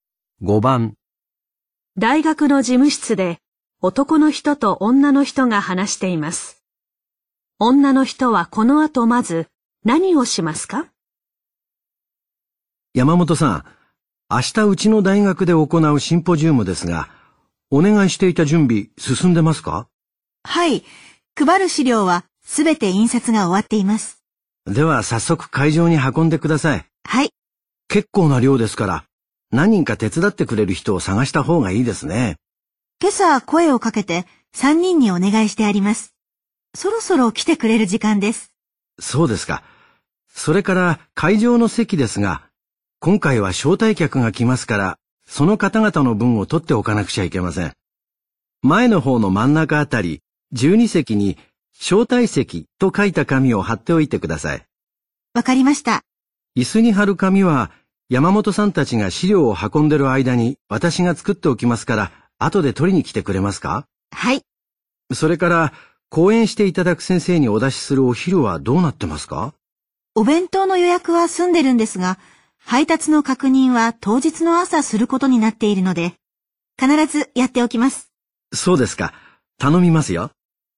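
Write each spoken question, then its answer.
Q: 女の人はこの後まず何をしますか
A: 配る資料を会場に運ぶ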